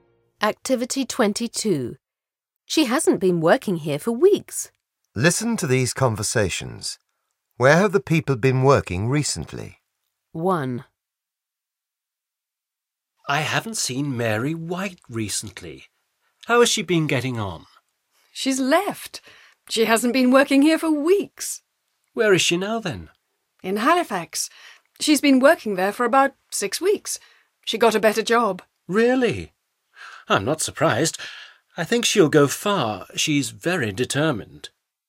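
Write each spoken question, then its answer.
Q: Where have the people been working recently?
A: Mary White has been working in Halifax.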